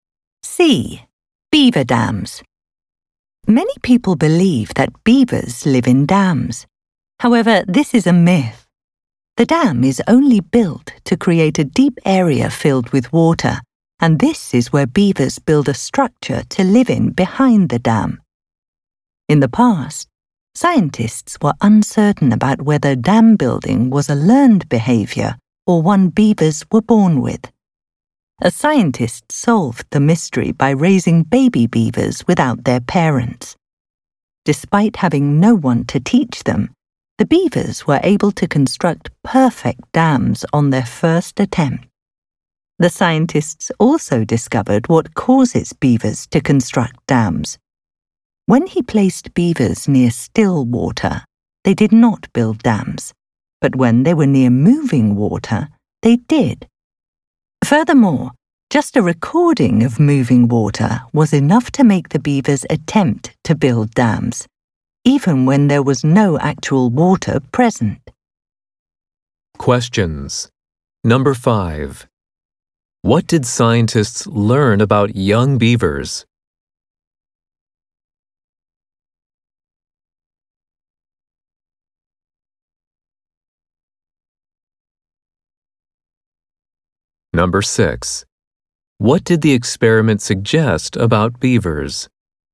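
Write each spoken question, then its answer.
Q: What did scientists learn about young beavers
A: They can build perfect dams without being taught; dam building is instinctive, not learned.

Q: What did the experiment suggest about beavers?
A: The sound of moving water makes them build dams.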